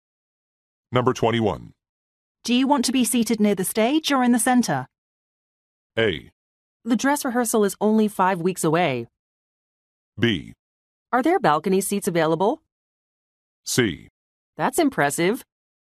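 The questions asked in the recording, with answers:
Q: Do you want to be seated near the stage or in the center?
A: B: Are there balcony seats available?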